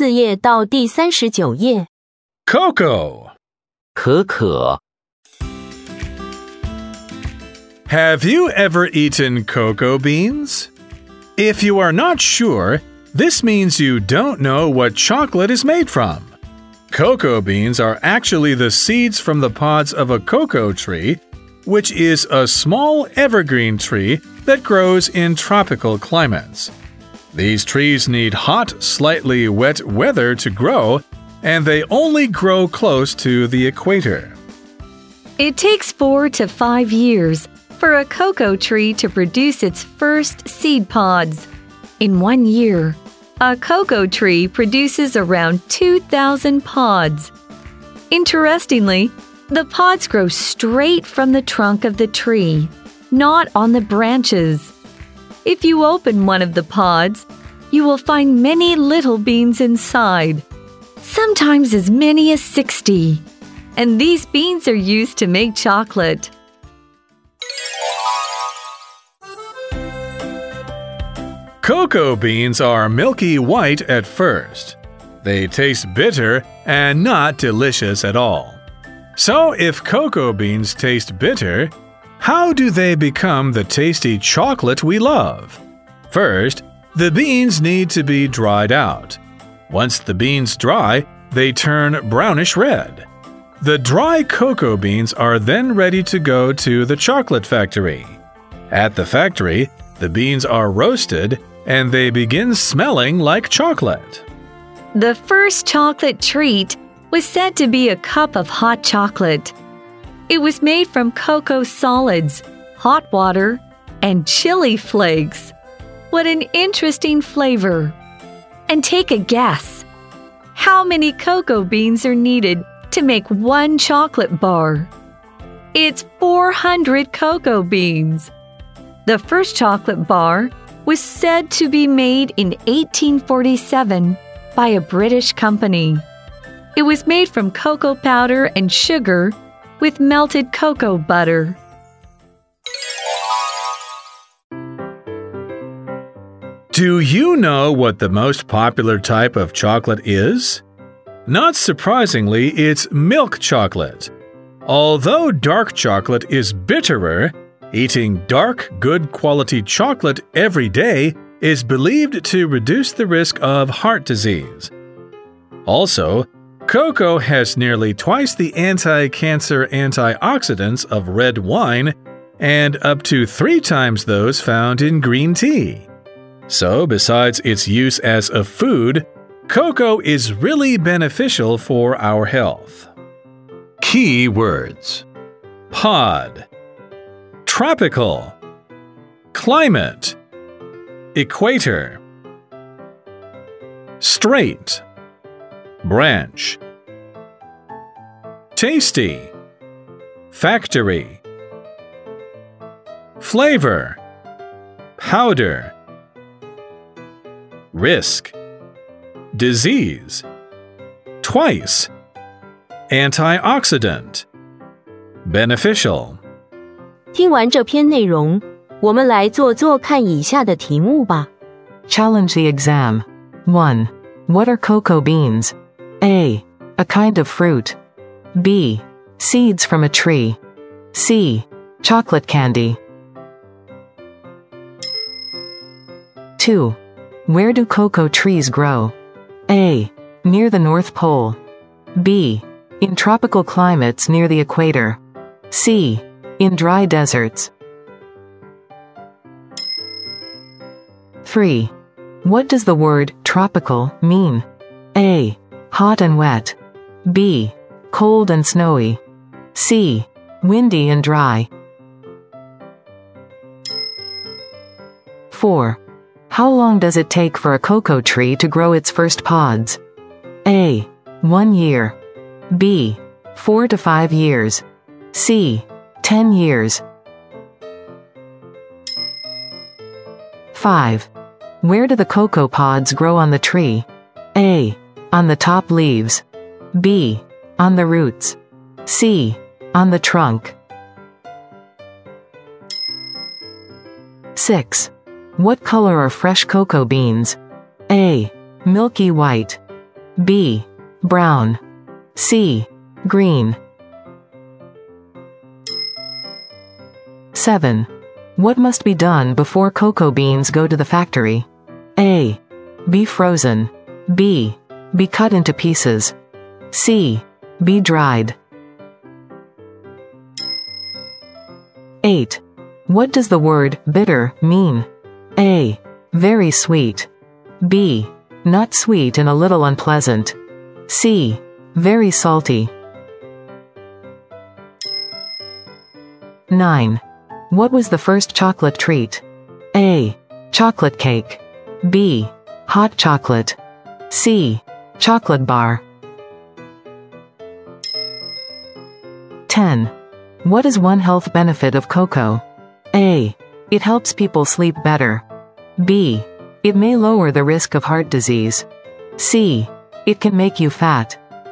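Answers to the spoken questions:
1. B: Seeds from a tree.
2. B: In tropical climates near the equator.
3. A: Hot and wet.
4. B: 4 to 5 years.
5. C: On the trunk.
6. A: Milky white.
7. C: Be dried.
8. B: Not sweet and a little unpleasant.
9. B: Hot chocolate.
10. B: It may lower the risk of heart disease.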